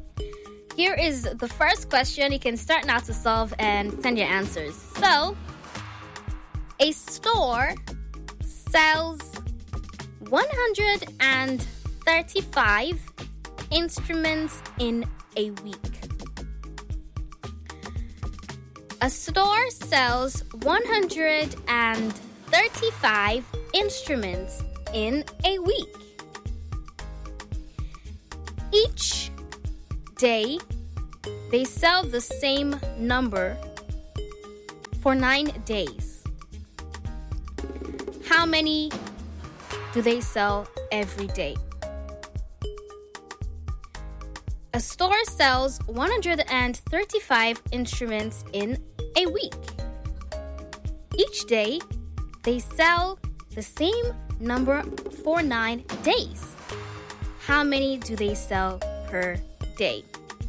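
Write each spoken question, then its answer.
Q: How many do they sell per day?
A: 15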